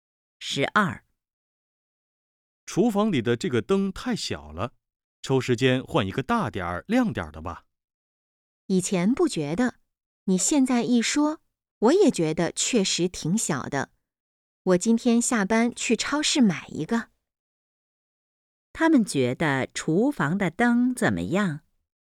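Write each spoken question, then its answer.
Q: 他们觉得厨房的灯怎么样?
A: 太小了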